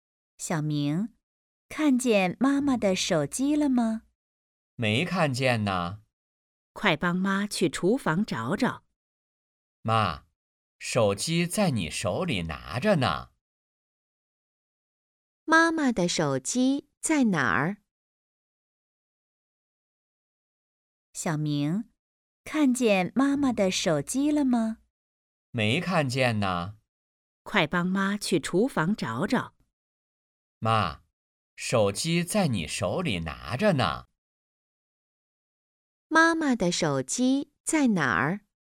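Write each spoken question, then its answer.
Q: 妈妈的手机在哪儿?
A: 在妈妈手里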